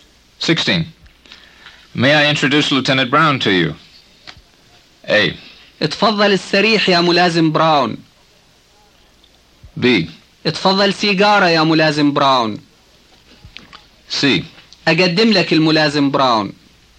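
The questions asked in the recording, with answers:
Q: May I introduce Lieutenant Brown to you?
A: C: اقدم لك الملازم براون.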